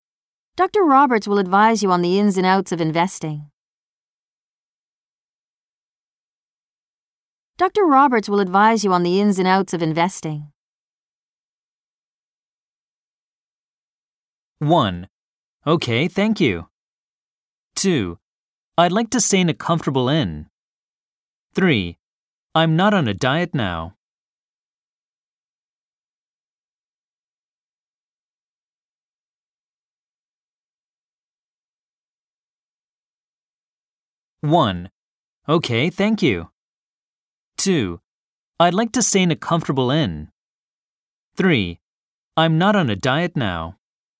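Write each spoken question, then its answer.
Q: Dr. Roberts will advise you on the ins and outs of investing.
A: 1: Okay, thank you.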